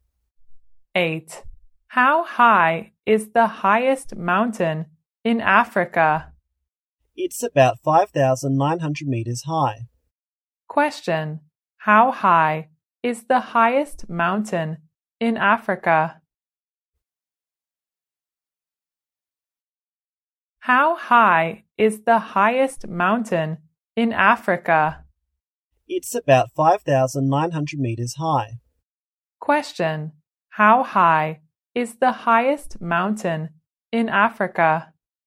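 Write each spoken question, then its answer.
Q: How high is the highest mountain in Africa?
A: About 5,900 meters high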